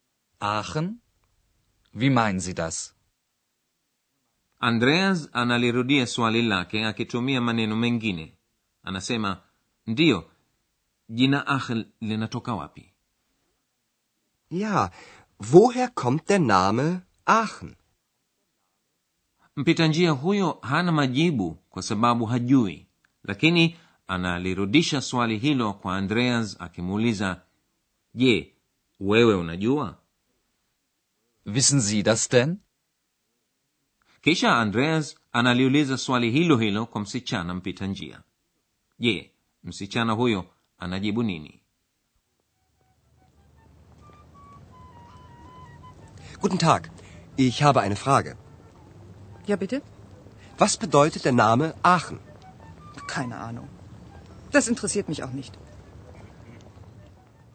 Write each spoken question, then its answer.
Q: Je, msichana huyo anajibu nini?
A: Msichana mpita njia anamjibu sijui keine ahnung na anaongeza kusema kuwa wala hilo si jambo muhimu kwangu mimi